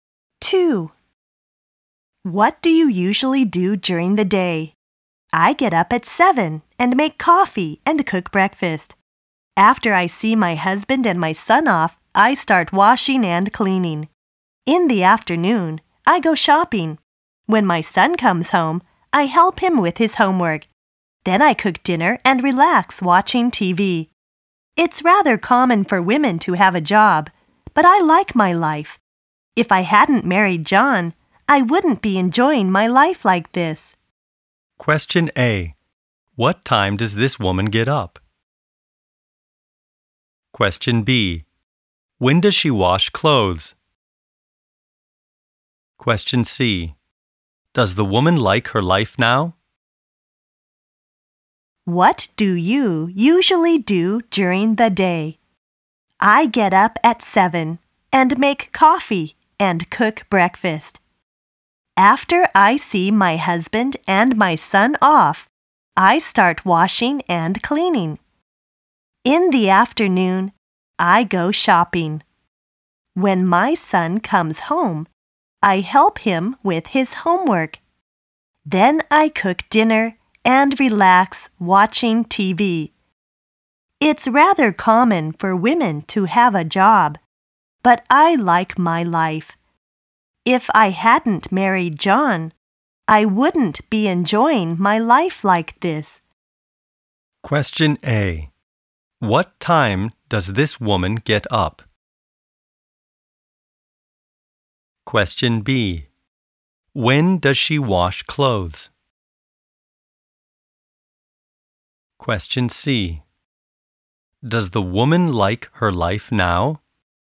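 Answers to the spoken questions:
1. At 7
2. After she sees her husband and son off in the morning
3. Yes, she does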